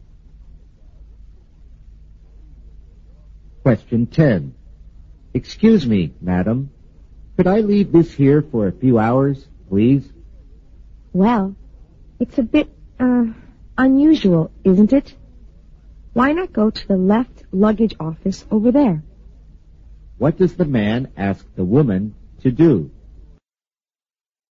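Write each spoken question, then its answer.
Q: What does the man ask the woman to do?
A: Let him leave his things there for a few hours.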